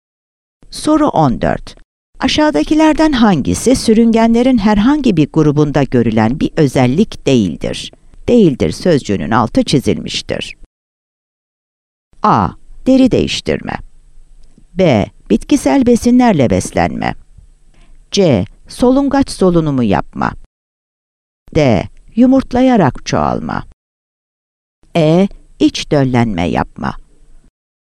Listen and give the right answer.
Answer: Yanıt C'dir.